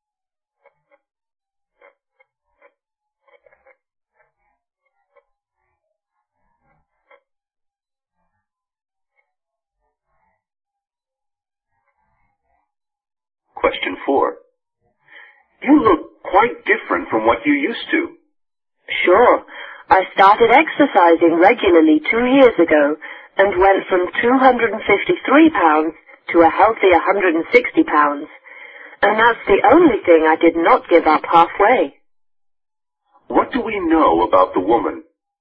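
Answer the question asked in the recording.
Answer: She lost a lot of weight by exercising regularly for 2 years.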